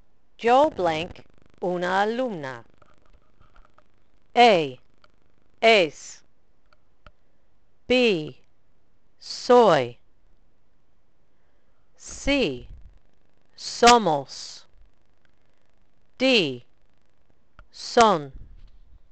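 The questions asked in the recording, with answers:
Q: Yo blank una alumna.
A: B: Soy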